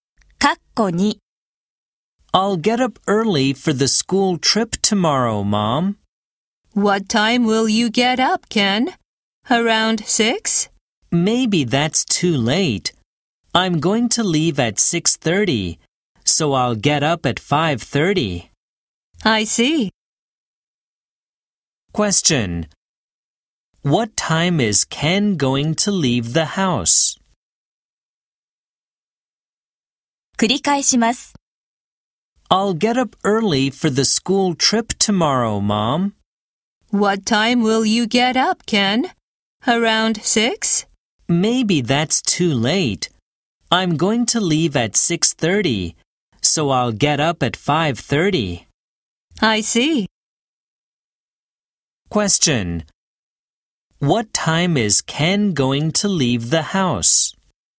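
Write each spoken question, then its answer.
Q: What time is Ken going to leave the house?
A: At 6:30.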